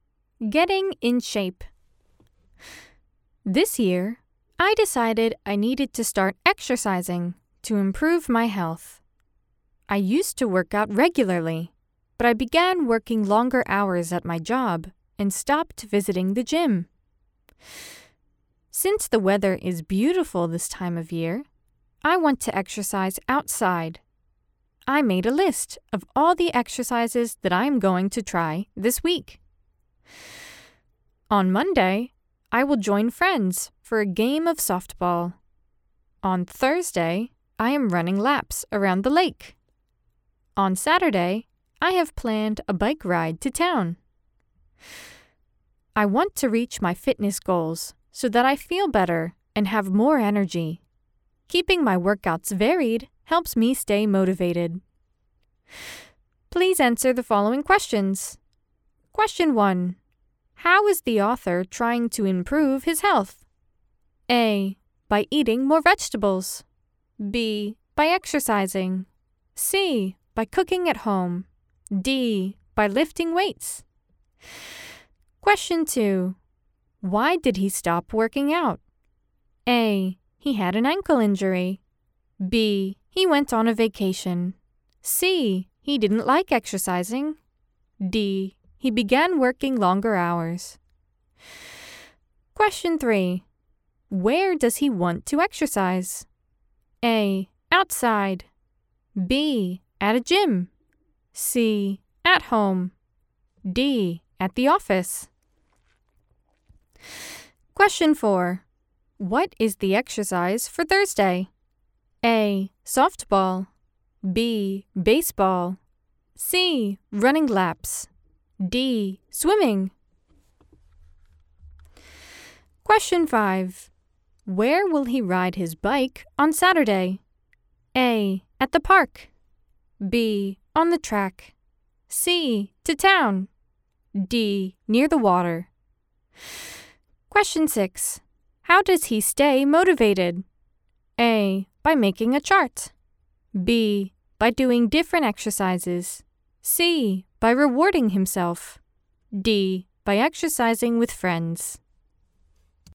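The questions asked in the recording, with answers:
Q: How is the author trying to improve his health?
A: B: By exercising.

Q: Why did he stop working out?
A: D: He began working longer hours.

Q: Where does he want to exercise?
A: A: Outside.

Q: What is the exercise for Thursday?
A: C: Running laps.

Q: Where will he ride his bike on Saturday?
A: C: To town.

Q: How does he stay motivated?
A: B: By doing different exercises.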